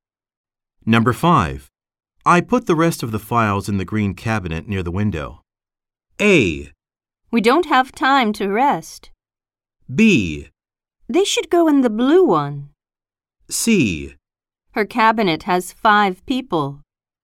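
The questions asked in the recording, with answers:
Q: I put the rest of the files in the green cabinet near the window.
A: B: They should go in the blue one.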